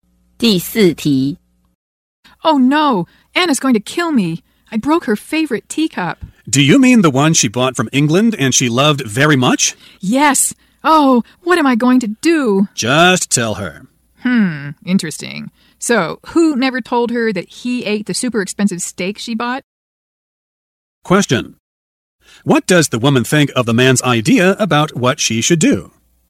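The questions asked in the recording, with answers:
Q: What does the woman think of the man's idea about what she should do?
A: She thinks he's a hypocrite, since he never told Anna he ate her expensive steak.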